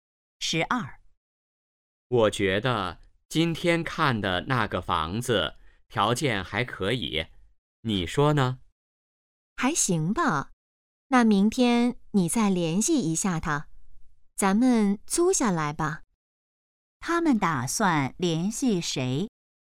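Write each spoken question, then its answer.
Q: 他们打算联系谁?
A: 房东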